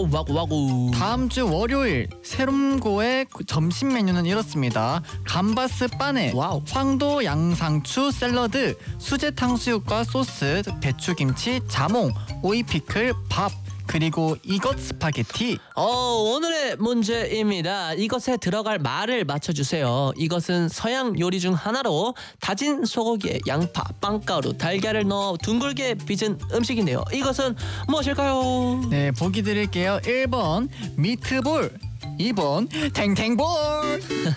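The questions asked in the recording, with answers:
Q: 이것은 무엇일까요?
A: 1: 미트볼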